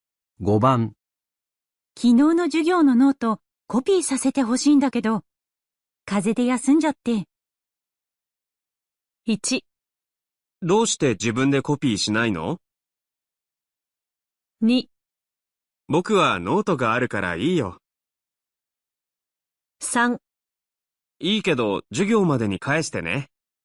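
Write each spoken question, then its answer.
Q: 昨日の授業のノートコピーさせてほしいんだけど、風邪で休んじゃって。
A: 3: いいけど授業までに返してね。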